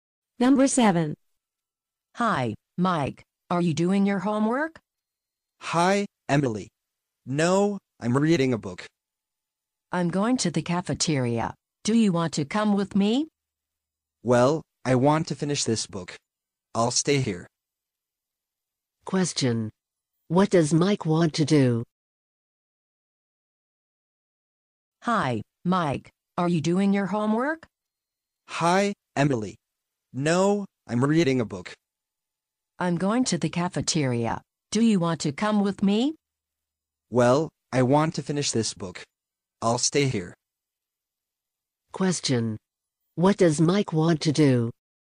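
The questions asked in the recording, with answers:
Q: What does Mike want to do?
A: Finish reading his book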